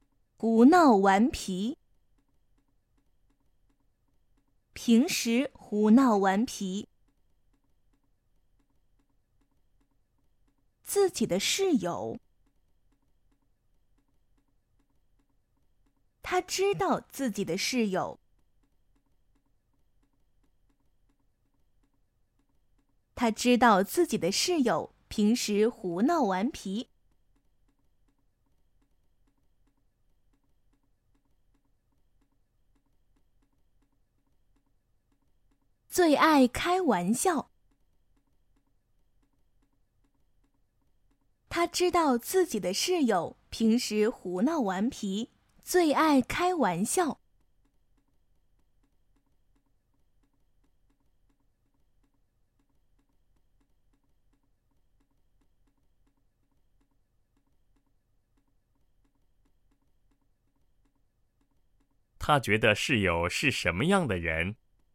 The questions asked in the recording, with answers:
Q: 他觉得室友是什么样的人?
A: 他知道自己的室友平时胡闹顽皮,最爱开玩笑。